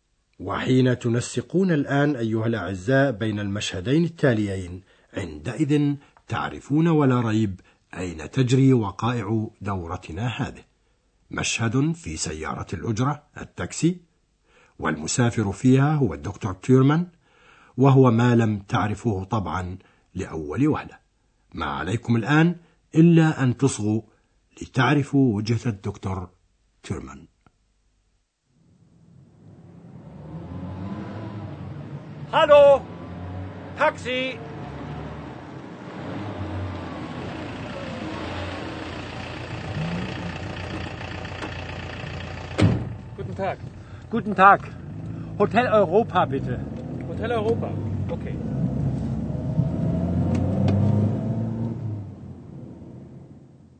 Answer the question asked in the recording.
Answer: إذا يود الدكتور تيرمان أن يوصله سائق سيارة الأجرة إلى فندق أوروبا.